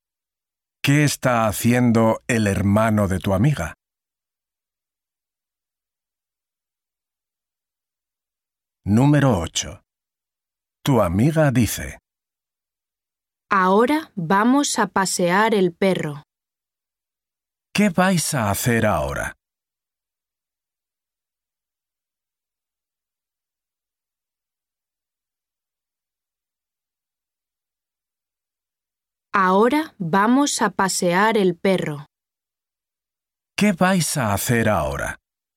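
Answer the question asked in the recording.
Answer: pasear el perro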